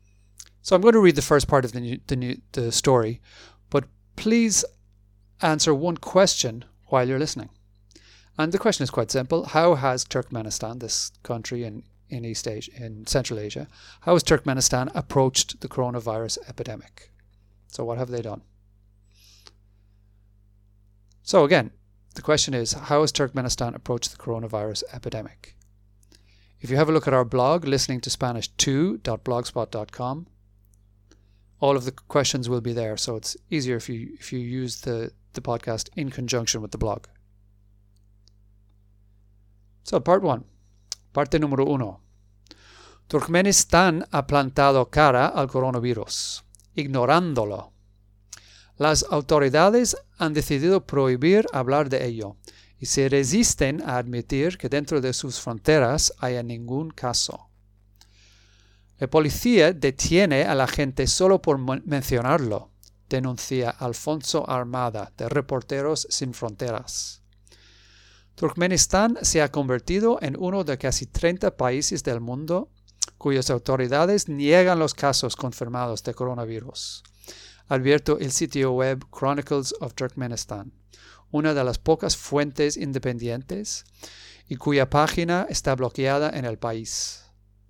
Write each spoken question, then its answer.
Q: How has Turkmenistan, this country in, in East Asia, in Central Asia, how has Turkmenistan approached the coronavirus epidemic?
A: It has faced up to or has faced the coronavirus by ignoring it, ignorándolo.